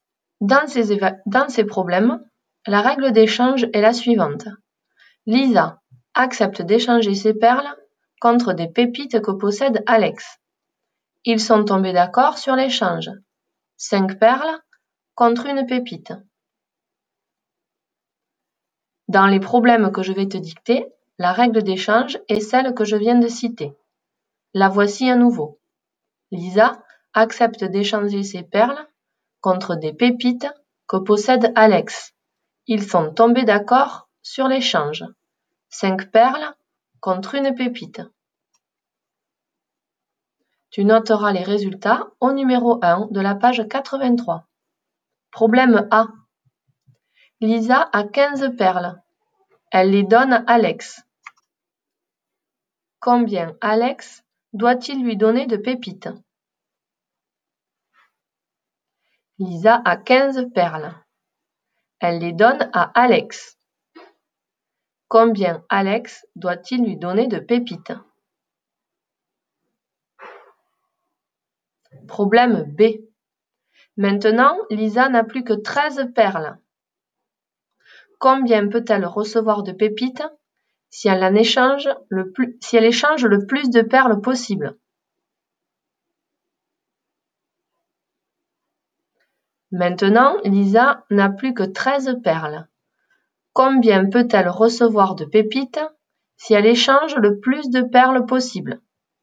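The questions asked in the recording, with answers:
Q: Combien Alex doit-il lui donner de pépites?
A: 3 pépites

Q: Combien peut-elle recevoir de pépites si elle échange le plus de perles possible?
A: 2 pépites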